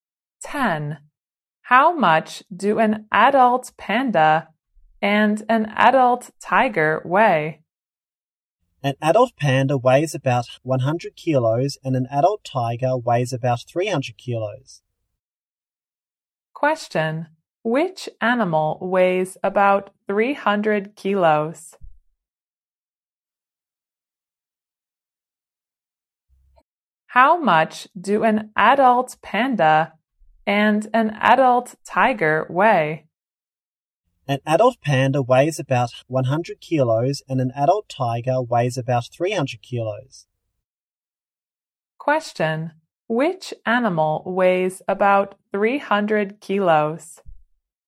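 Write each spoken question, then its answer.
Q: Which animal weighs about 300 kilos?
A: An adult tiger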